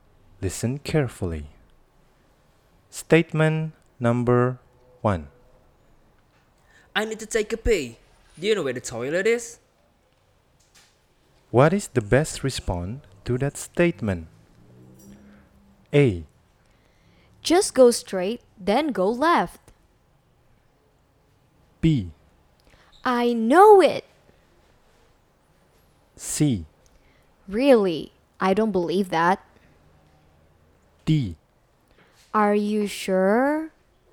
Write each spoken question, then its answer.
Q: What is the best response to that statement?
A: Nomor satu, jawabannya A.